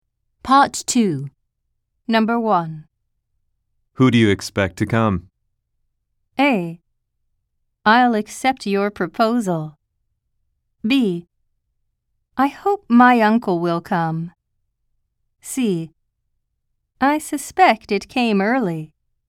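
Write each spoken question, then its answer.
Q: Who do you expect to come?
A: B: I hope my uncle will come.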